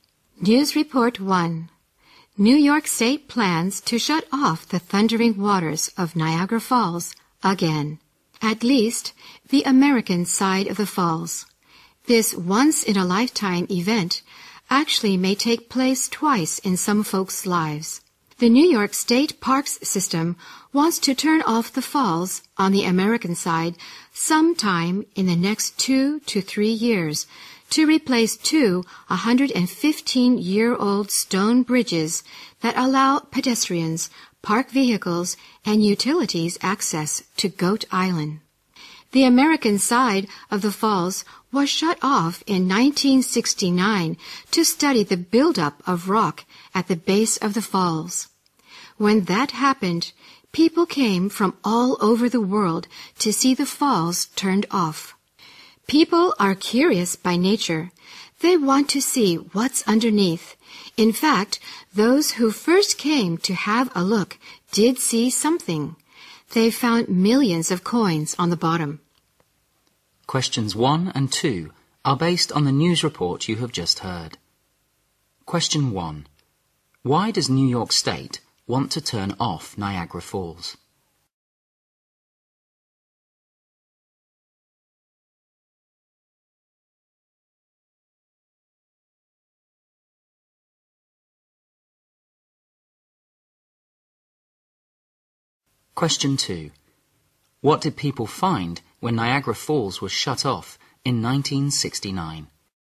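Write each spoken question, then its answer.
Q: Why does New York State want to turn off Niagara Falls?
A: To replace two 115-year-old stone bridges to Goat Island

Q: What did people find when Niagara Falls was shut off in 1969?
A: Millions of coins on the bottom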